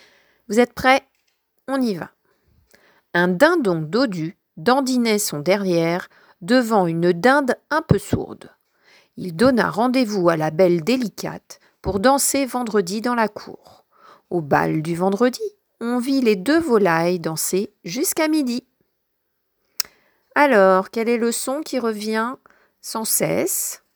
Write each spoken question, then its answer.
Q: Alors, quel est le son qui revient sans cesse?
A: Eh oui, il s'agit du son « d » que fait la lettre « d ».